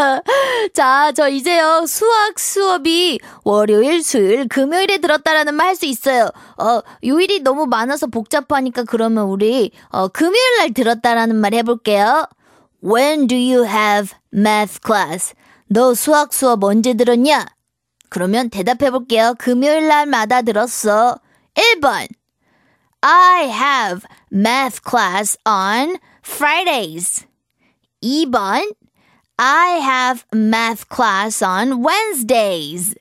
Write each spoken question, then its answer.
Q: When do you have math class?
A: 1번이 정답이네요.